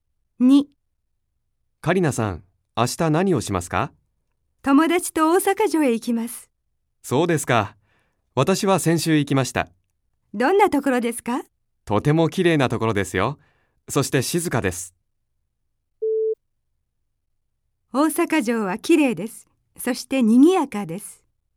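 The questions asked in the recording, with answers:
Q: 大阪城はきれいです。そしてにぎやかです。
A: ×(静かです)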